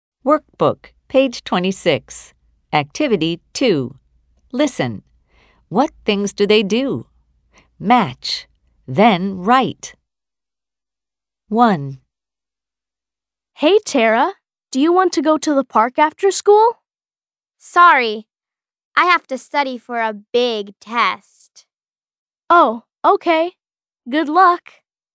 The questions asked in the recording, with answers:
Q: What things do they do?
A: Tara studies for a test.